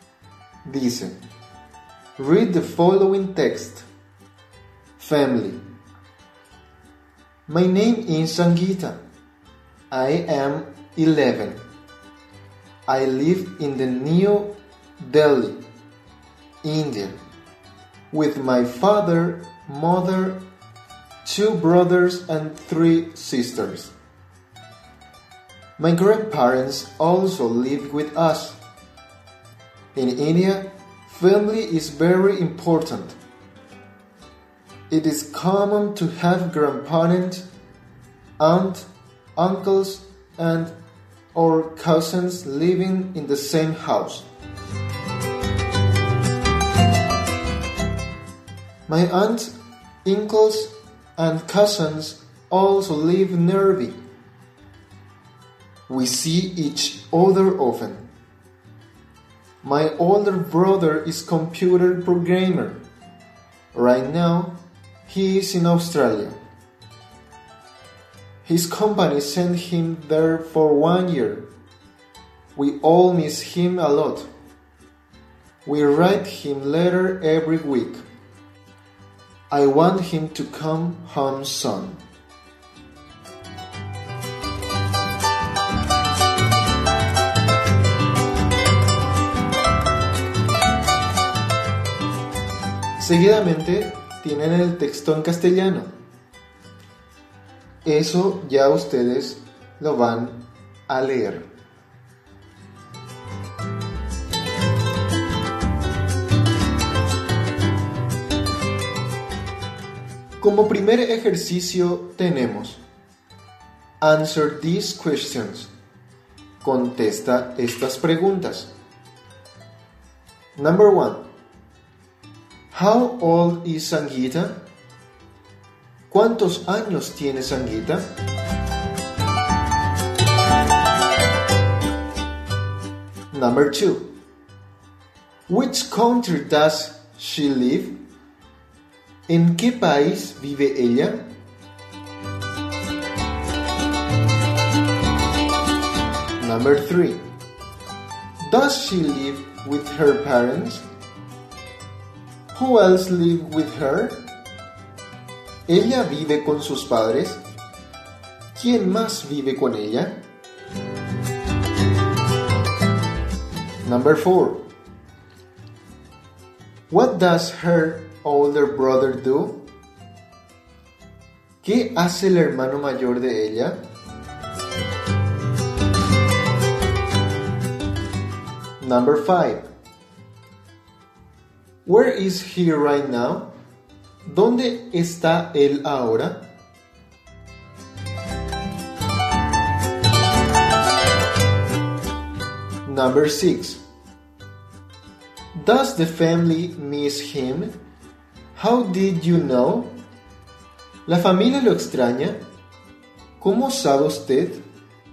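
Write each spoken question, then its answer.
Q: How old is Sangeeta?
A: She is 11.

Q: Which country does she live?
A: India

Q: Does she live with her parents? Who else live with her?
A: Yes; her 2 brothers, 3 sisters and grandparents also live with her.

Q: What does her older brother do?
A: He is a computer programmer.

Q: Where is he right now?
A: In Australia

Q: Does the family miss him? How did you know?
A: Yes; they write him a letter every week and want him to come home soon.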